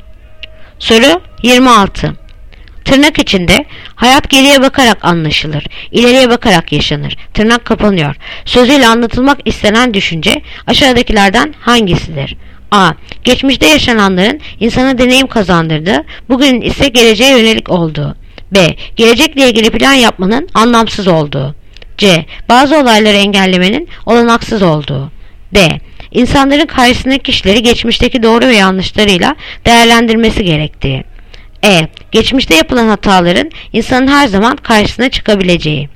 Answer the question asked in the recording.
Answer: Yanıt Adana. Geçmişte yaşananların insana deneyim kazandırdığı, bugün ise geleceğe yönelik olduğu.